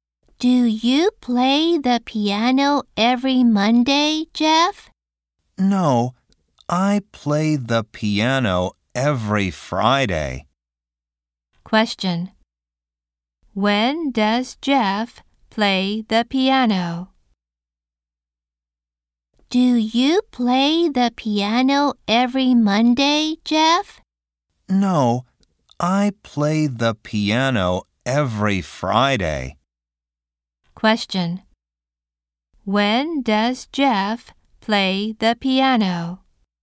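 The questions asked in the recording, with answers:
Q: When does Jeff play the piano?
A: Every Friday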